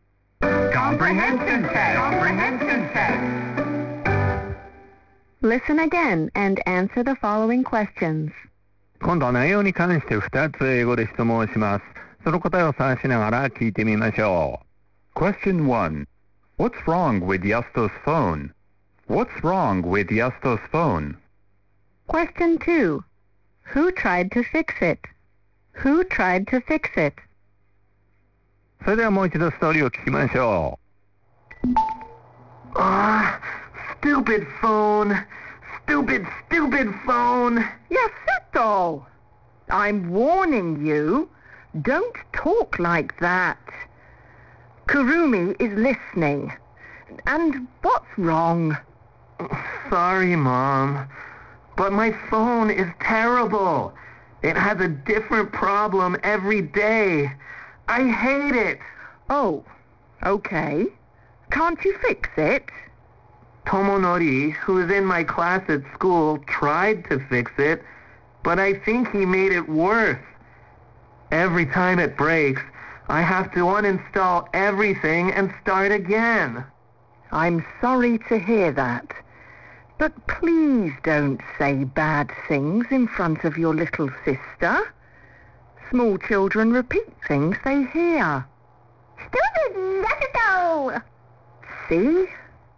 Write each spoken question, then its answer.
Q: What's wrong with Yasto's phone?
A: Answer. It has a different problem every day.

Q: Who tried to fix it?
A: Answer. Tomonori.